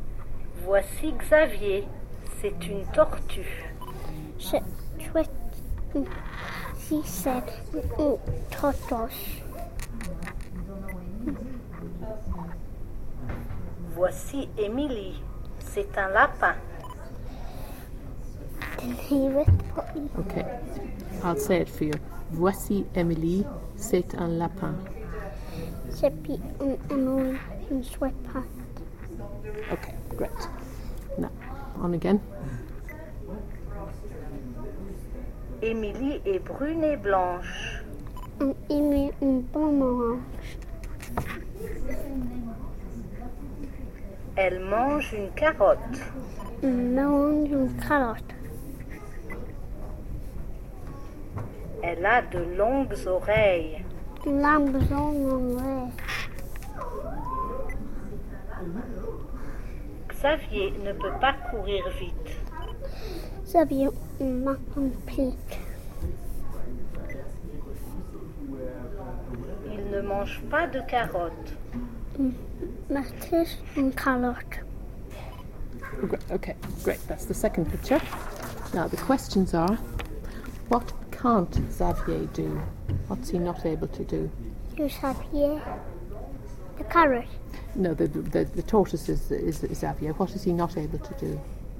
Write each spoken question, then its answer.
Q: what can't Xavier do?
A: Run.